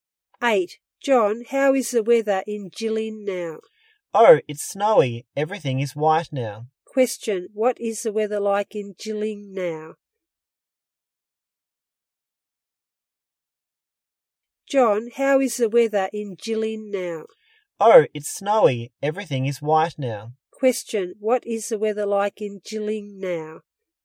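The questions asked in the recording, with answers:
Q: Question, what is the weather like in Jilin now?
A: Snowy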